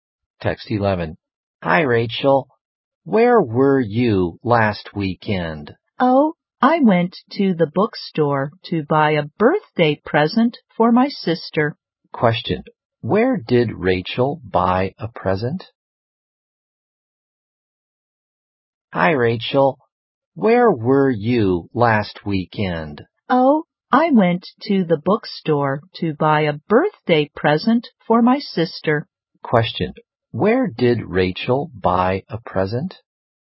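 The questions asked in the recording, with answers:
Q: Where did Rachel buy a present?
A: At the bookstore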